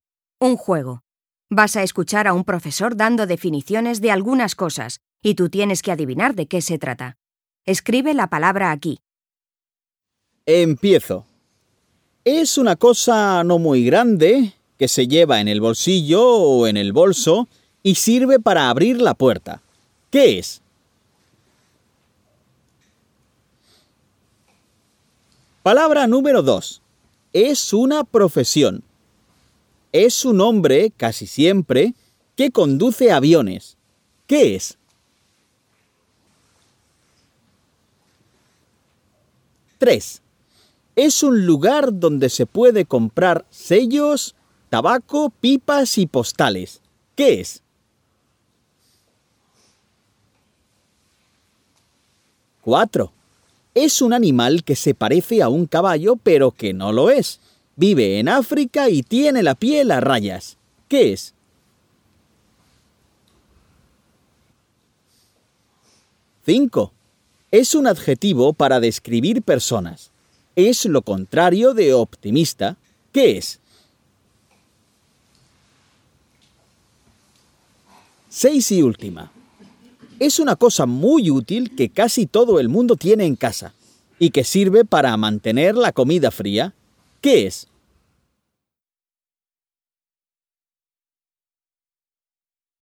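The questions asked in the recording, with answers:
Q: Es una cosa no muy grande que se lleva en el bolsillo o en el bolso y sirve para abrir la puerta. ¿Qué es?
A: una llave

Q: Es una profesión. Es un hombre, casi siempre, que conduce aviones. ¿Qué es?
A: piloto

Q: Es un lugar donde se puede comprar sellos, tabaco, pipas y postales. ¿Qué es?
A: un estanco

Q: Es un animal que se parece a un caballo, pero que no lo es. Vive en África y tiene la piel a rayas. ¿Qué es?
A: una cebra

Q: Es un adjetivo para describir personas. Es lo contrario de optimista. ¿Qué es?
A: pesimista

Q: Es una cosa muy útil que casi todo el mundo tiene en casa y que sirve para mantener la comida fría. ¿Qué es?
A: una nevera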